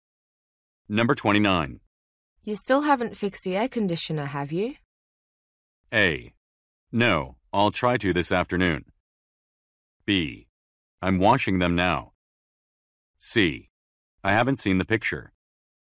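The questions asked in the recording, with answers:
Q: You still haven't fixed the air conditioner, have you?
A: A: No, I'll try to this afternoon.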